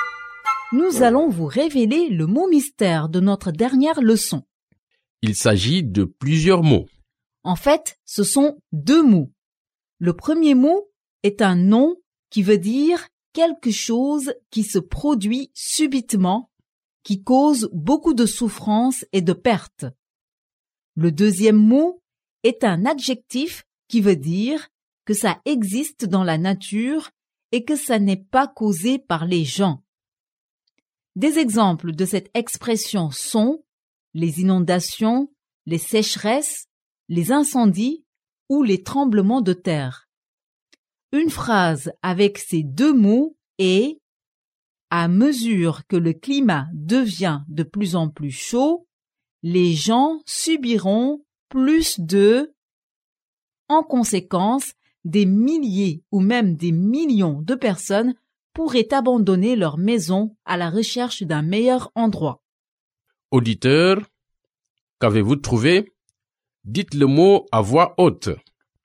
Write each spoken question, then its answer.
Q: Auditeur, qu'avez-vous trouvé?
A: catastrophe naturelle